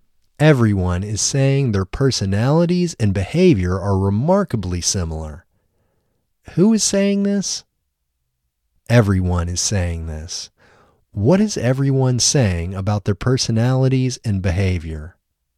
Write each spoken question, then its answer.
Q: What is everyone saying about their personalities and behavior?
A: Everyone is saying their personalities and behavior are remarkably similar.